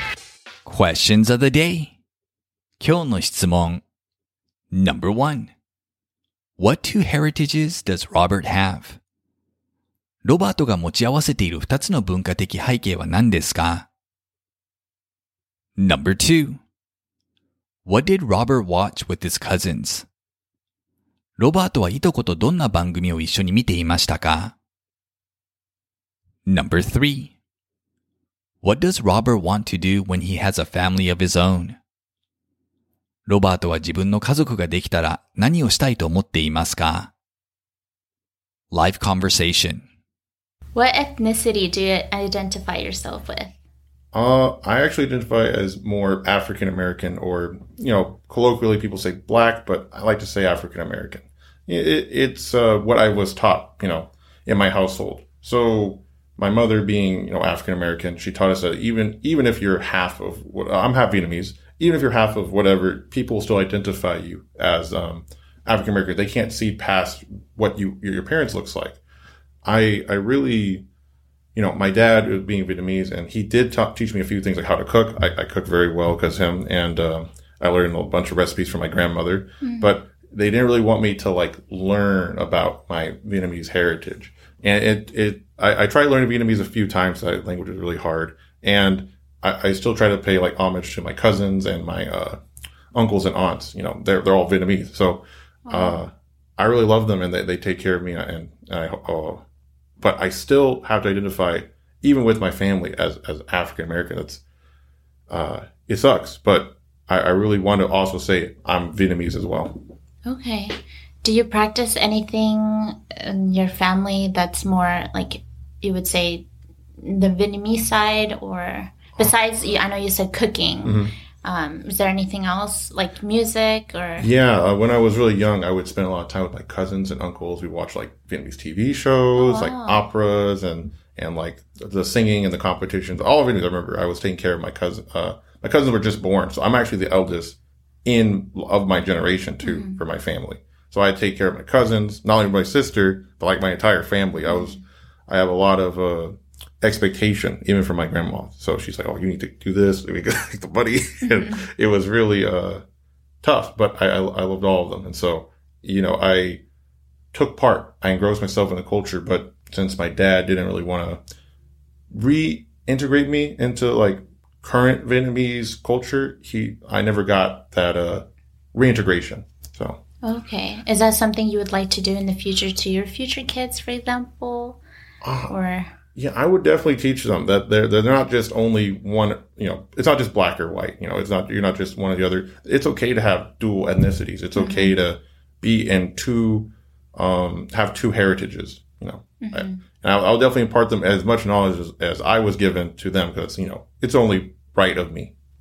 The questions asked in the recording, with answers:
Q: What two heritages does Robert have?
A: He has both African American and Vietnamese heritages.

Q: What did Robert watch with his cousins?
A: He used to watch Vietnamese TV shows, such as operas and singing competition shows.

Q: What does Robert want to do when he has a family of his own?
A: He wants to teach his children about both their African American and Vietnamese heritages.